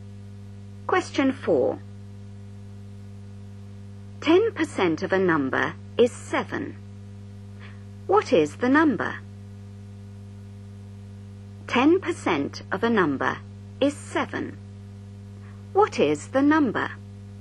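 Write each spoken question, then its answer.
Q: 10% of a number is 7. What is the number?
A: 70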